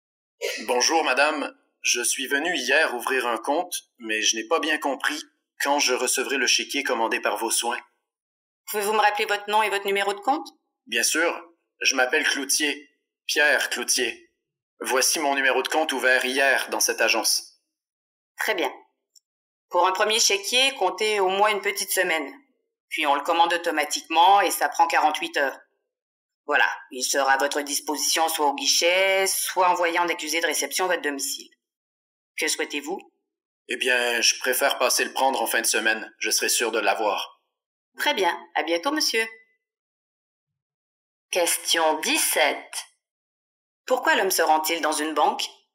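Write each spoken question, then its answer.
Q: Pourquoi l'homme se rend-il dans une banque?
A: Pour savoir quand il recevra son premier chéquier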